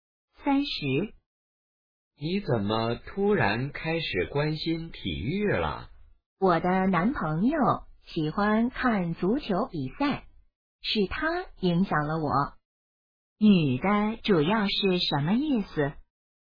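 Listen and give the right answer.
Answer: 她是受男朋友影响才开始关心体育的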